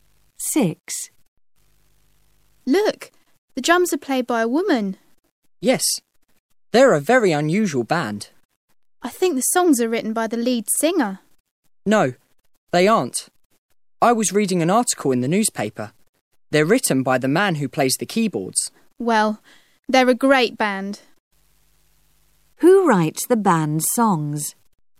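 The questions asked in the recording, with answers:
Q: Who writes the band's songs?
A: The man who plays the keyboards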